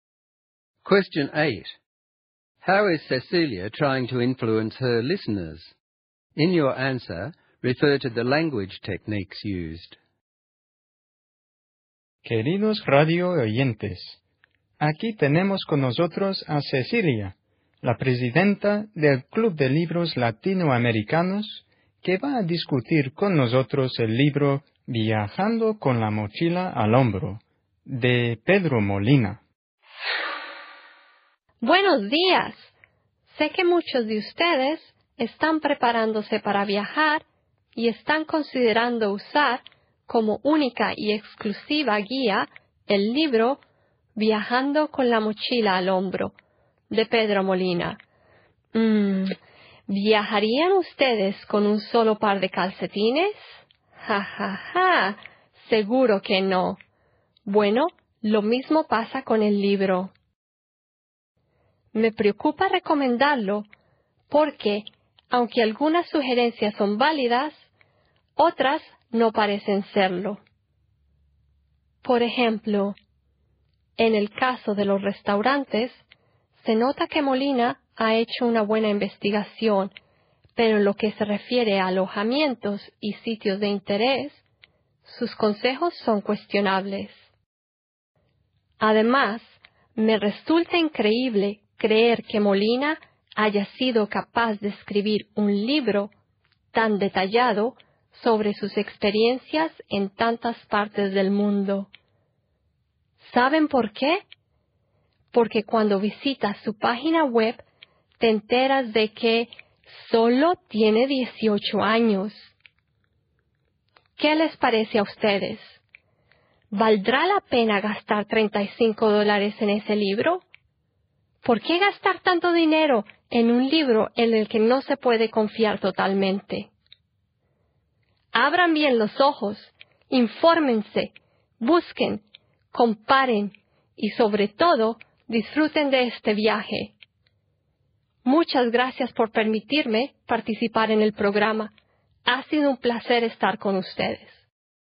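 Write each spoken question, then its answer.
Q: How is Cecilia trying to influence her listeners?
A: She tries to persuade them not to rely only on Molina's book, or spend $35 on it. She uses rhetorical questions, an analogy (travelling with one pair of socks), humour, doubts about the author being only 18, and direct commands (open your eyes, compare).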